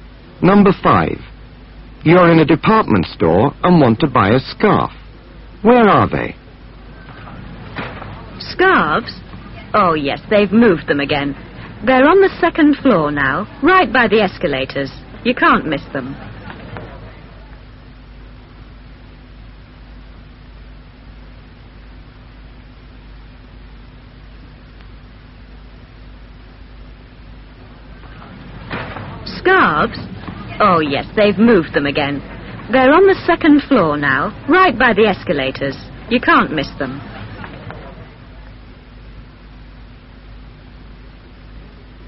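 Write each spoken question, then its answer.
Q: Where are they?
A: On the second floor, by the escalators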